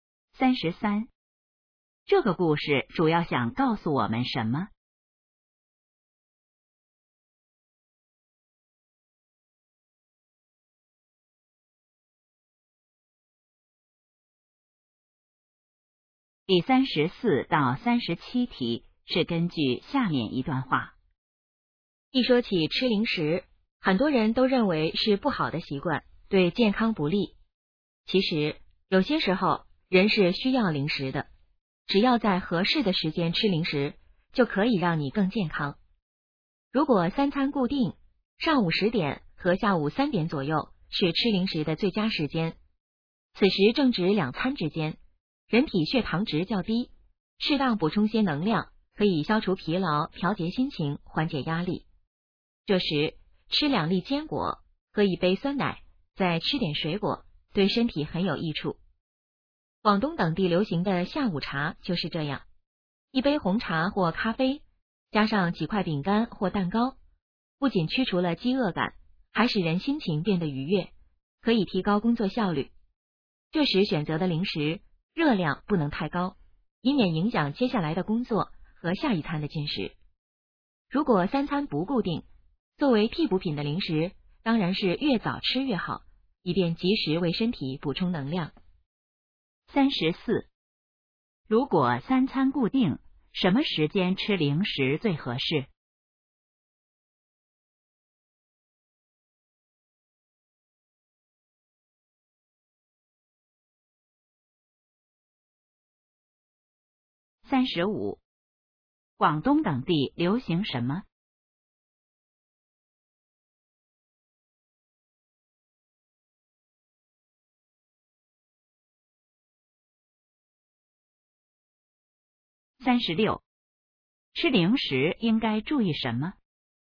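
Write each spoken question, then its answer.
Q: 如果三餐固定,什么时间吃零食最合适?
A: 上午10点和下午3点左右

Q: 广东等地流行什么?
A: 下午茶

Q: 吃零食应该注意什么?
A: 热量不能太高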